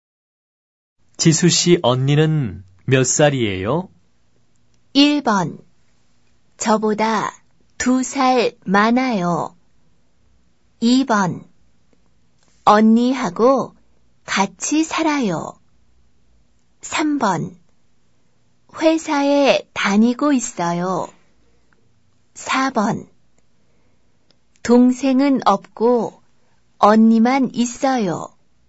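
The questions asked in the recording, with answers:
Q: 지수 씨 언니는 몇 살이에요?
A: 1: 저보다 2살 많아요.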